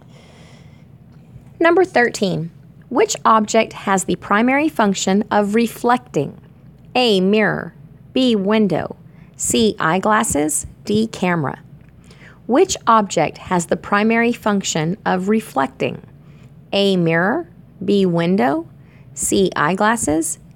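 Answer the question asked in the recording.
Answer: A: Mirror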